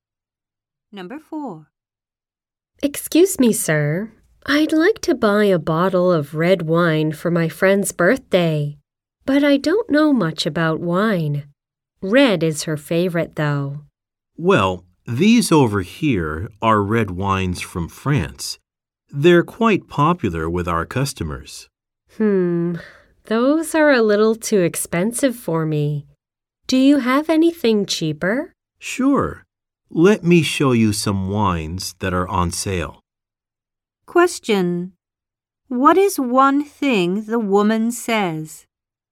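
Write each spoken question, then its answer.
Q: What is one thing the woman says?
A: The French wines are too expensive for her.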